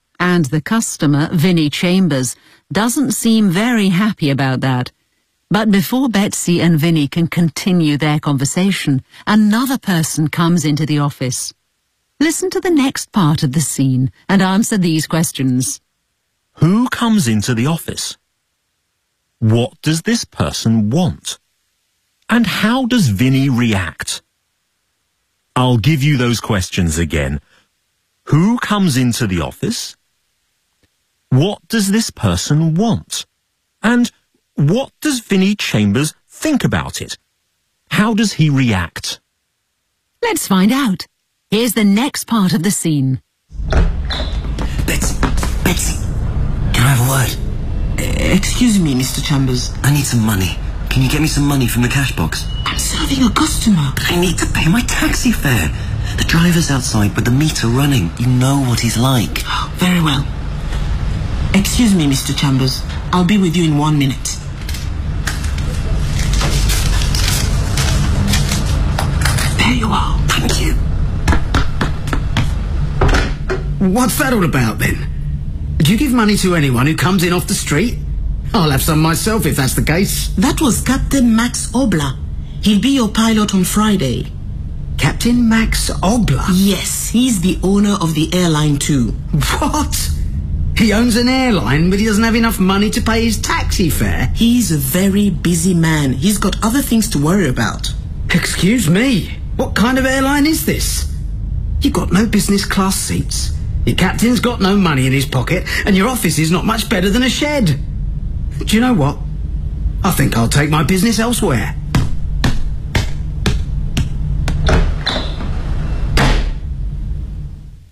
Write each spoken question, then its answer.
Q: Who comes into the office?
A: Captain Max Obler. He's the pilot of the plane, and he's also the owner of the airline.

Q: What does this person want?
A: He wants some money to pay his taxi fare, because the driver is waiting outside.

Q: And how does Vinnie react?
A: Well, he's not impressed.